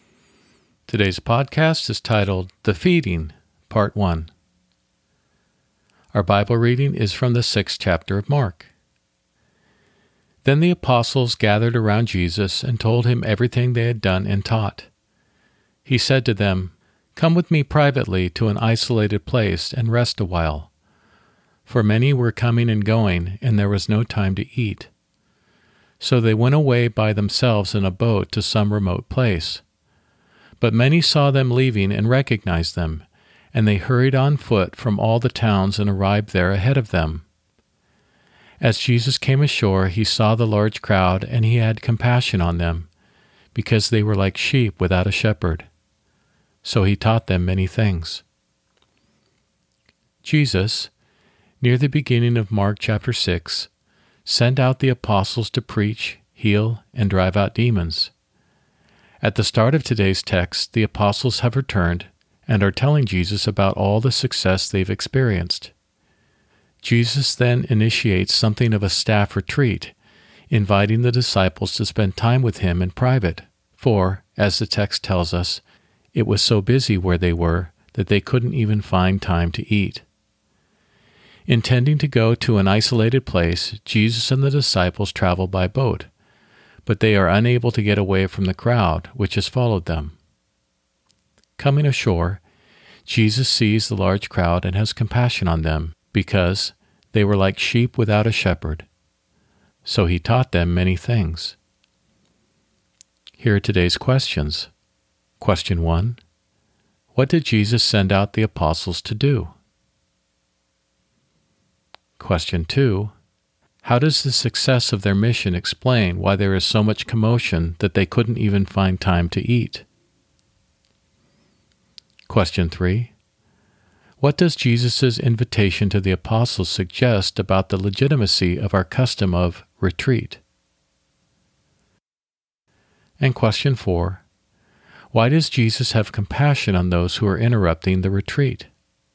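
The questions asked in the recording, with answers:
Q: What did Jesus send out the apostles to do?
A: To preach, heal, and drive out demons

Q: Why does Jesus have compassion on those who are interrupting the retreat?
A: Because they were like sheep without a shepherd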